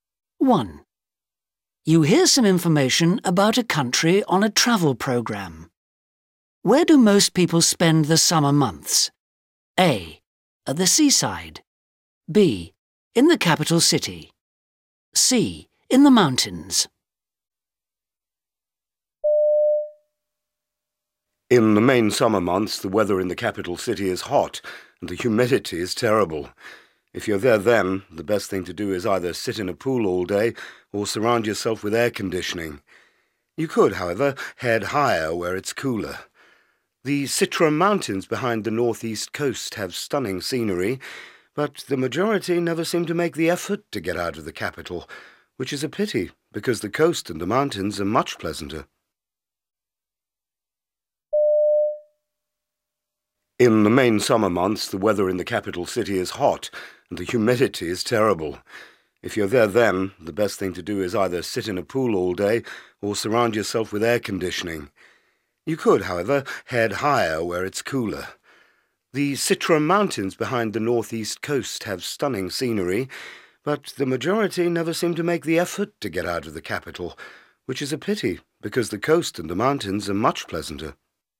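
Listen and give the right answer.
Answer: B: In the capital city.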